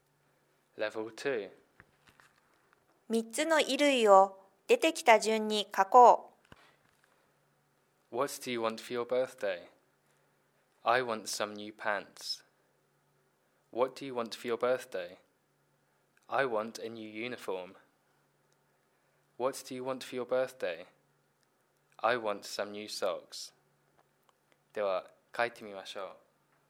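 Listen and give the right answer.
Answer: pants, uniform, socks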